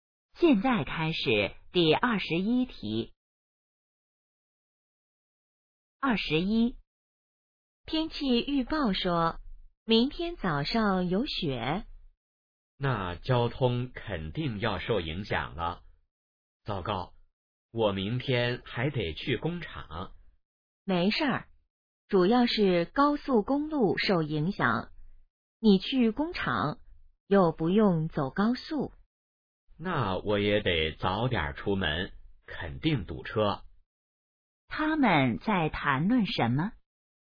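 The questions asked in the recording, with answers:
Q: 他们在谈论什么?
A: 下雪对交通的影响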